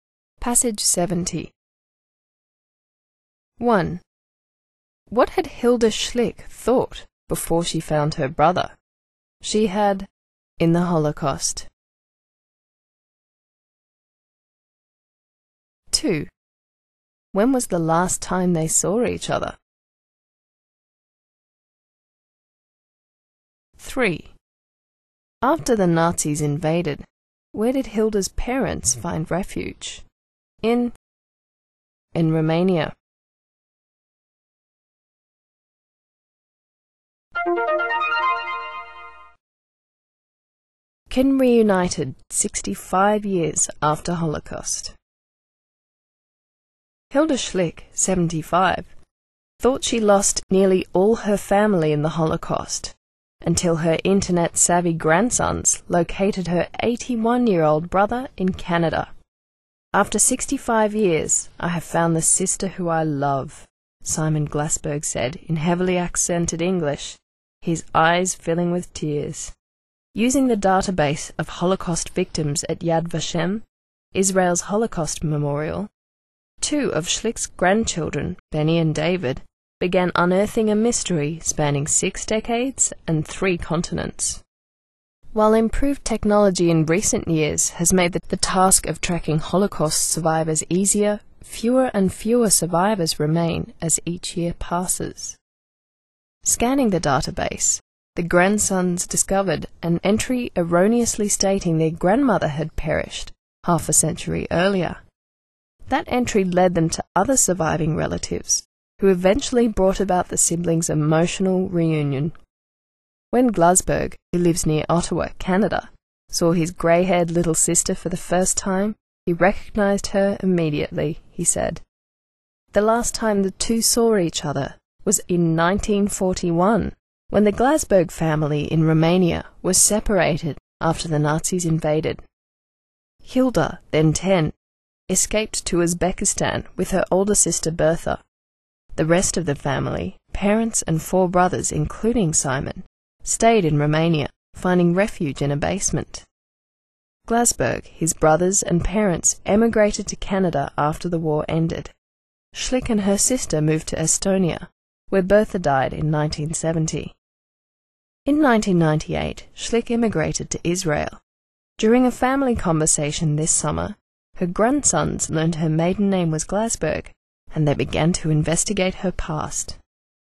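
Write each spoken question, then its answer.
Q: What had Hilda Schlick thought before she found her brother?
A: That she had lost nearly all her family in the Holocaust

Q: When was the last time they saw each other?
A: In 1941

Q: After the Nazis invaded, where did Hilda's parents find refuge?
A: In a basement in Romania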